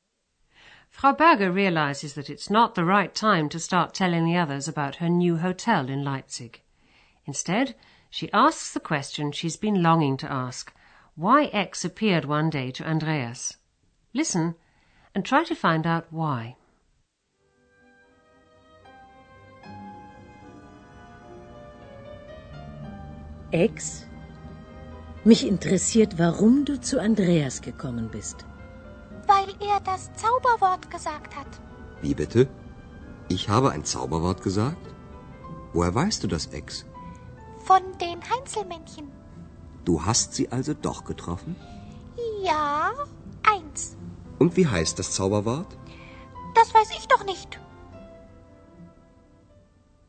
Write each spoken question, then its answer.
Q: Instead, she asks the question she's been longing to ask why X appeared one day to Andreas.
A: X suddenly appeared because Andreas said the magic word.